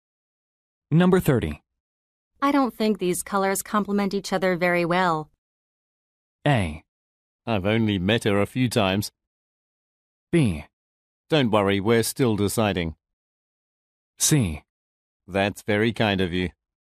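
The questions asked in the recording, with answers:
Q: I don't think these colors complement each other very well.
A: B: Don't worry, we're still deciding.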